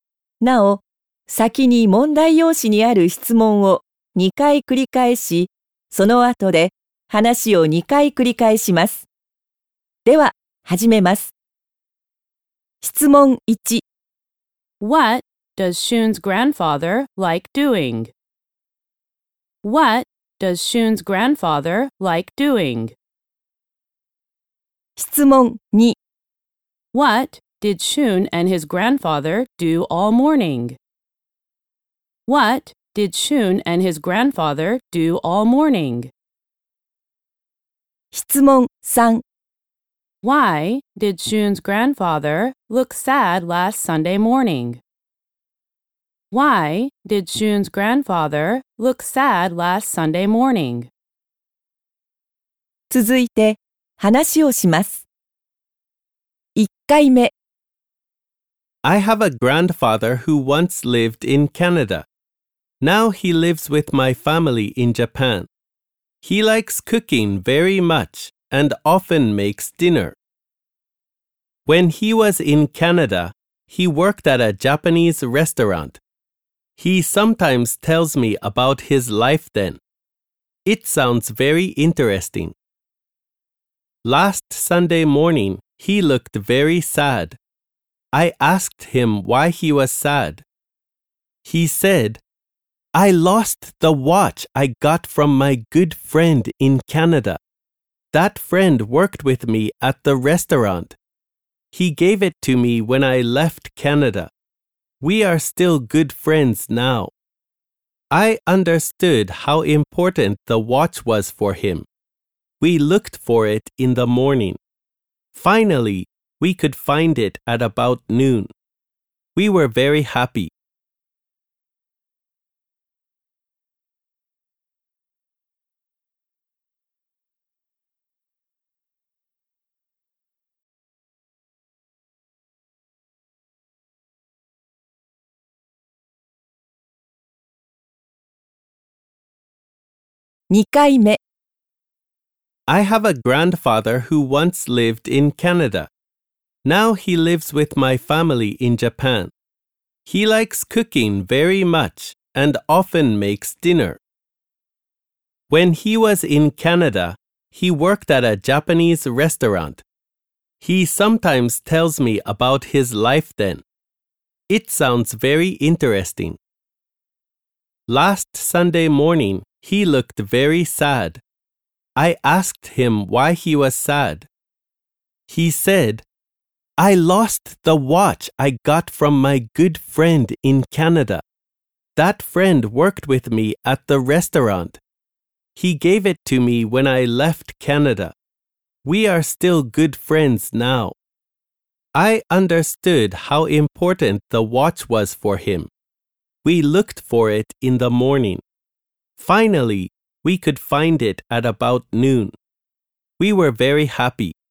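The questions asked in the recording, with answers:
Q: What does Shun's grandfather like doing?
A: He likes cooking

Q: What did Shun and his grandfather do all morning?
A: They looked for his grandfather's watch

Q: Why did Shun's grandfather look sad last Sunday morning?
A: Because he lost the watch he got from his good friend in Canada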